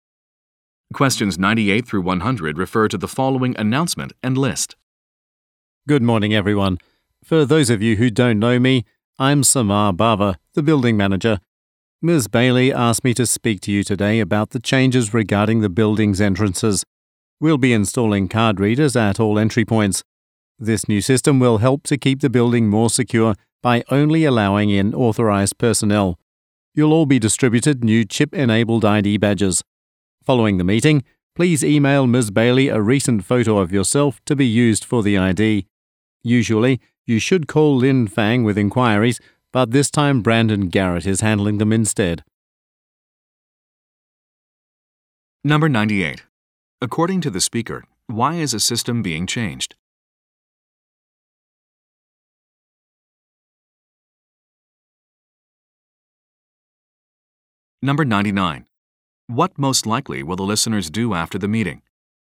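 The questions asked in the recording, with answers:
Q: According to the speaker, why is a system being changed?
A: To improve building security

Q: What most likely will the listeners do after the meeting?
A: Email a recent photo to Ms. Bailey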